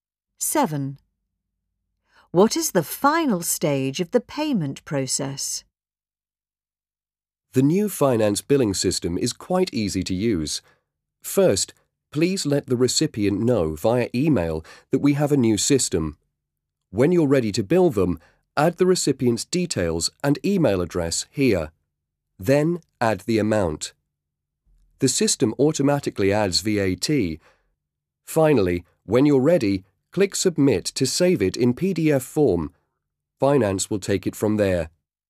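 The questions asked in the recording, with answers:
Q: What is the final stage of the payment process?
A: Click Submit to save it as a PDF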